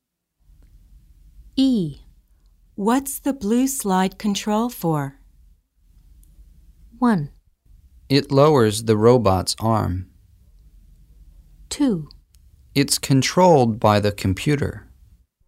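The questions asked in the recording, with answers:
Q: What's the blue slide control for?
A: 1: It lowers the robot's arm.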